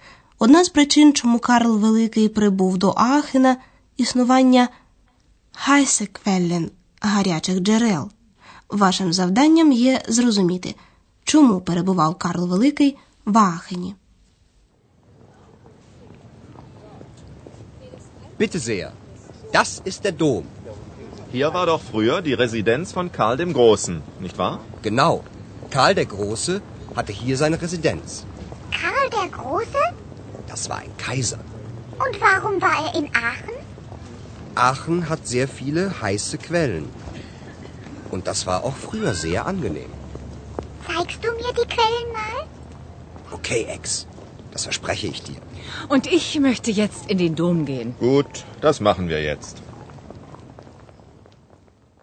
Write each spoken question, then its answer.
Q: Вашим завданням є зрозуміти, чому перебував Карл Великий в Аахені.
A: Отже, Карл Великий перебував в Ахені, бо йому подобалися гарячі джерела.